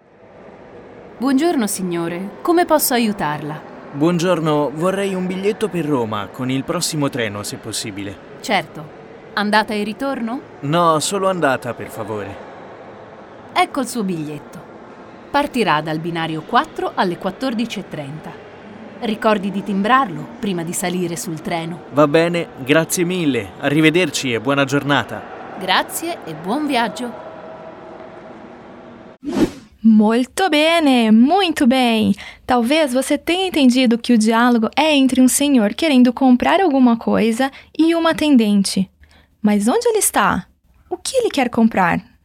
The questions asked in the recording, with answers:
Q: O que ele quer comprar?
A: comprando uma passagem